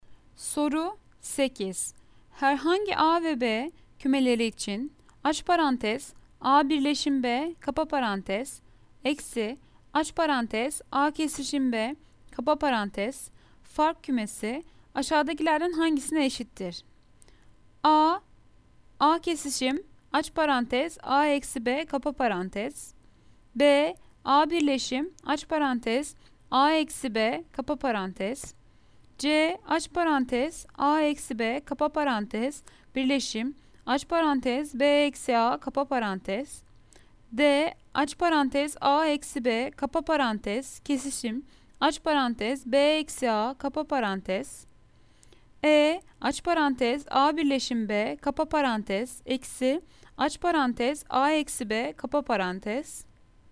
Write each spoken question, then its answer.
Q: Herhangi A ve B kümeleri için aç parantez A birleşim B kapa parantez eksi aç parantez A kesişim B kapa parantez fark kümesi aşağıdakilerden hangisine eşittir?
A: Cevap Ceyhan aç parantez A eksi B kapa parantez birleşim aç parantez B eksi A kapa parantez.